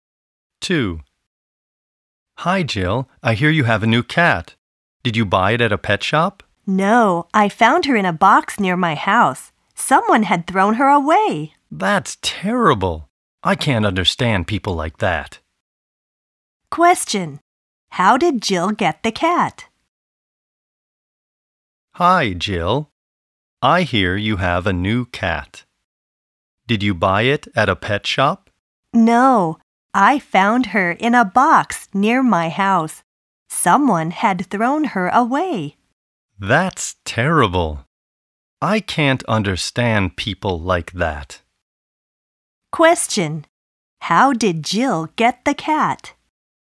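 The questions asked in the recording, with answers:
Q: How did Jill get the cat?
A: She found her in a box near her house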